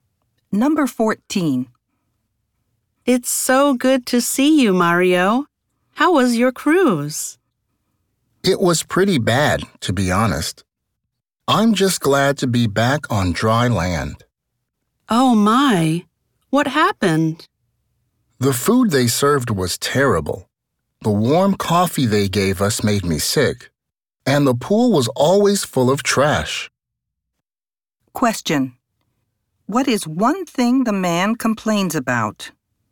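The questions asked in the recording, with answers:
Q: what is one thing the man complains about?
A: The food was terrible (also: the coffee made him sick; the pool was full of trash)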